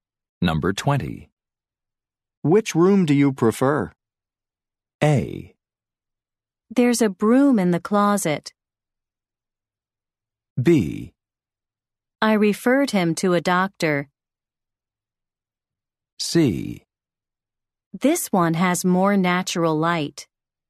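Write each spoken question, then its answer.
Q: Which room do you prefer?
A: C: This one has more natural light.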